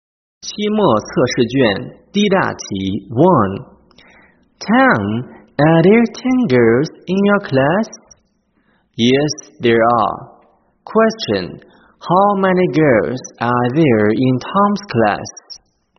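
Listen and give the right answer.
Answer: 10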